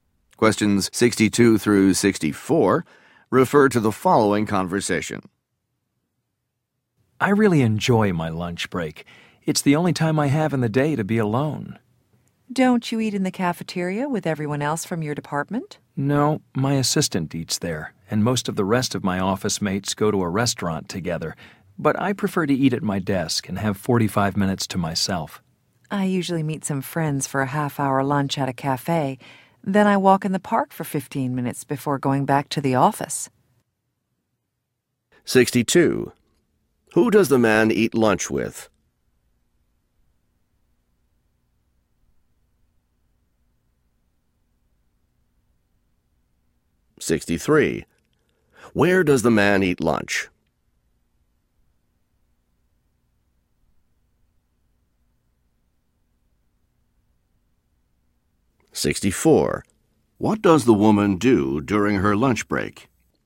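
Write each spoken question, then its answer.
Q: Who does the man eat lunch with?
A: Nobody; he eats alone

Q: Where does the man eat lunch?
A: At his desk

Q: What does the woman do during her lunch break?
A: Has lunch with friends at a cafe and walks in the park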